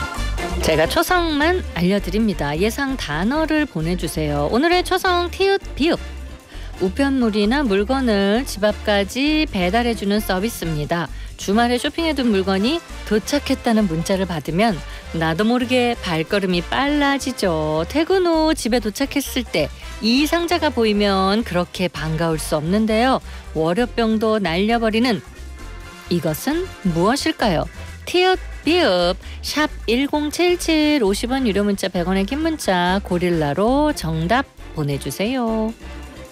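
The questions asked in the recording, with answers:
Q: 월요병도 날려버리는 이것은 무엇일까요?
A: 택배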